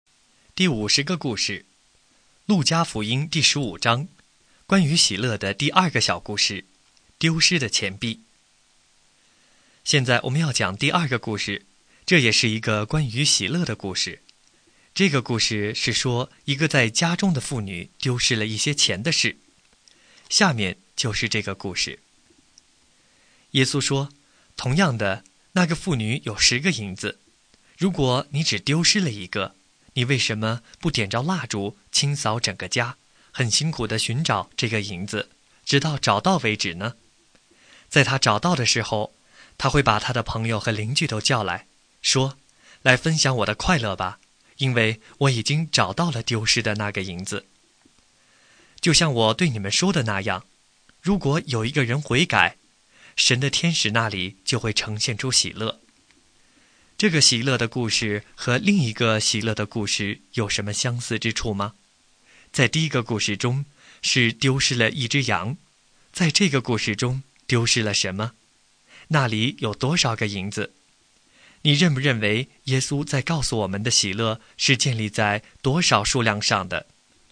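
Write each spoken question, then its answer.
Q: 在第一个故事中是丢失了一只羊,在这个故事中丢失了什么?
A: 一个银子(钱币)

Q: 那里有多少个银子?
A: 十个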